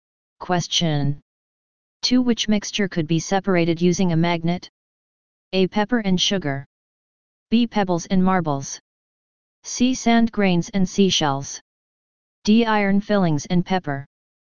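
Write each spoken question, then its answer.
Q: Which mixture could be separated using a magnet?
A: D: Iron fillings and pepper.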